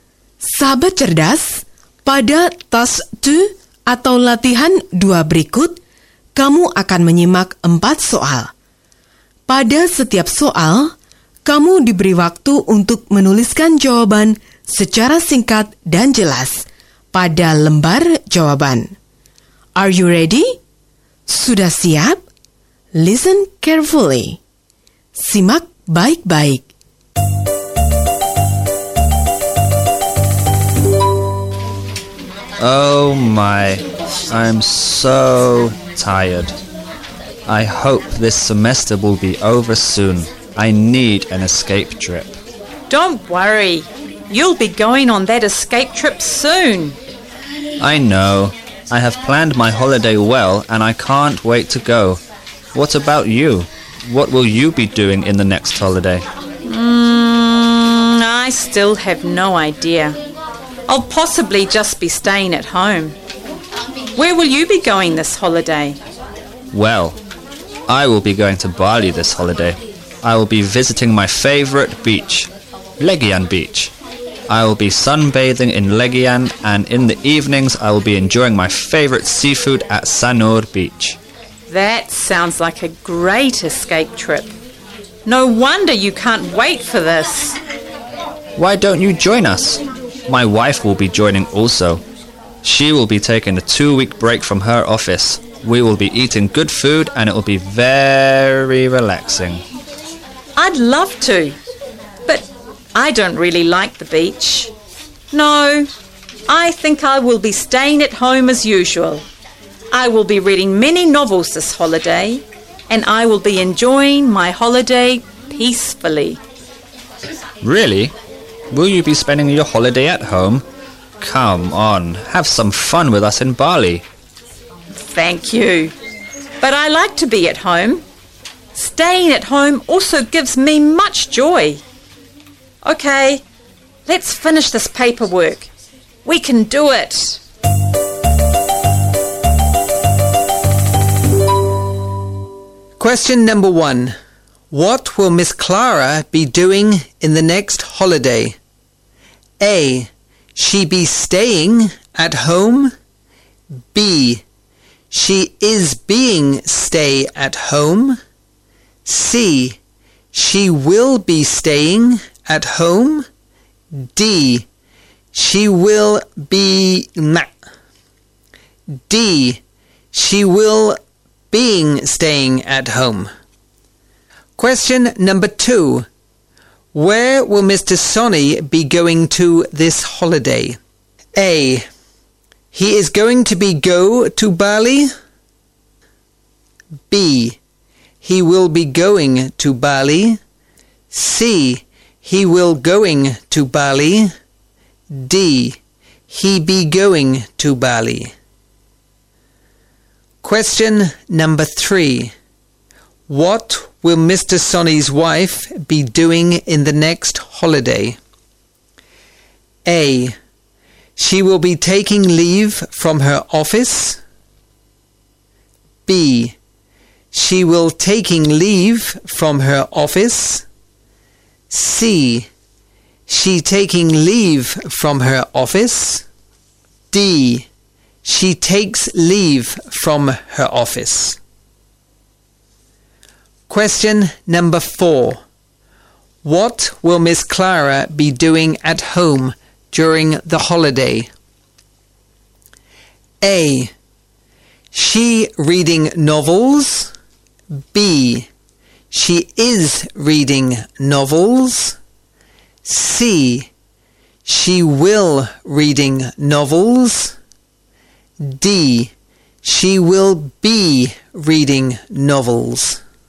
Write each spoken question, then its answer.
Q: What will Miss Clara be doing in the next holiday?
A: C. She will be staying at home.

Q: Where will Mr. Sonny be going to this holiday?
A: B. He will be going to Bali.

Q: What will Mr. Sonny's wife be doing in the next holiday?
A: A. She will be taking leave from her office.